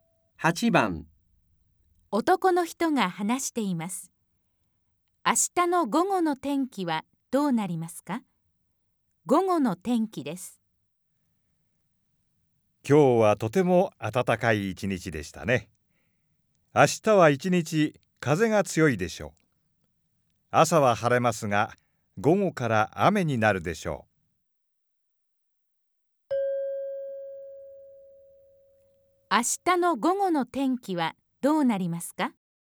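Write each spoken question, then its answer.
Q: 明日の午後の天気はどうなりますか?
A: 雨で、風が強い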